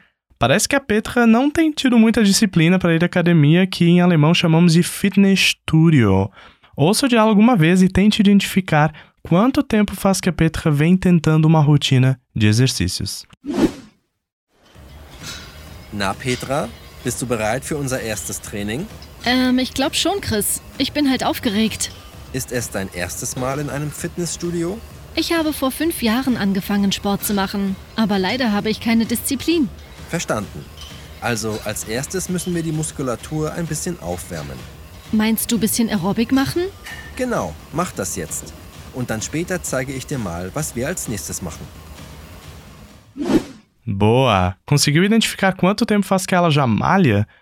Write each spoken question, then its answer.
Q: Conseguiu identificar quanto tempo faz que ela já malha?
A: ela diz: Eu comecei a malhar há uns cinco anos.